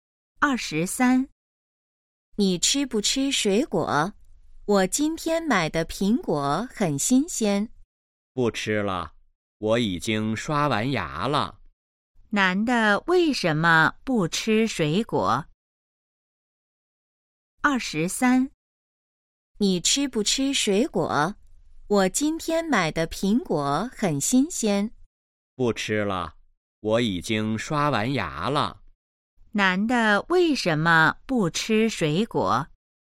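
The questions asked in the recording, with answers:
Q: 男的为什么不吃水果?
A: 已经刷完牙了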